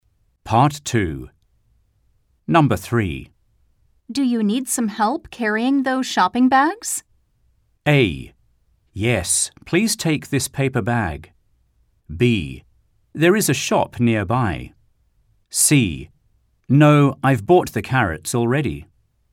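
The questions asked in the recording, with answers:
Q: Do you need some help carrying those shopping bags?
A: A: Yes, please take this paper bag.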